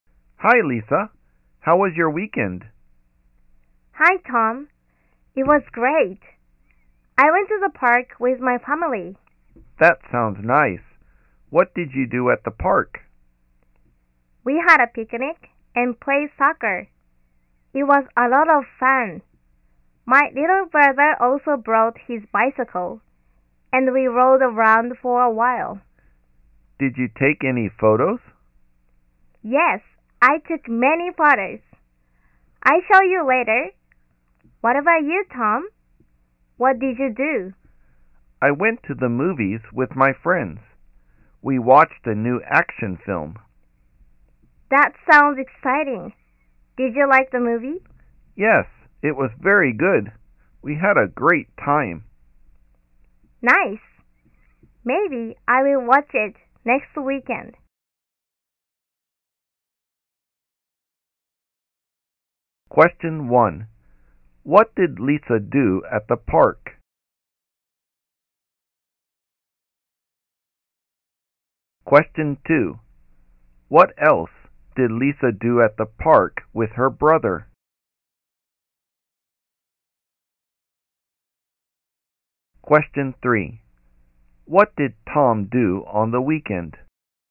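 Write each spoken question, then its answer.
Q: What did Lisa do at the park?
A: She had a picnic and played soccer.

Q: What else did Lisa do at the park with her brother?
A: They rode around on his bicycle.

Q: What did Tom do on the weekend?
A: He went to the movies with his friends and watched a new action film.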